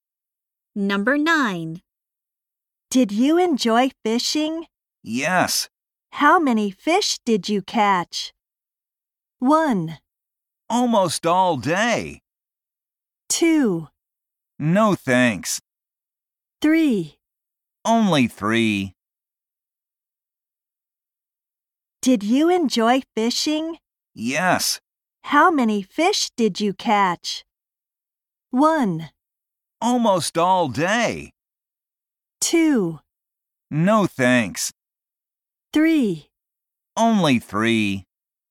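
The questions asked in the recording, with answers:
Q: How many fish did you catch?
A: 3: Only 3.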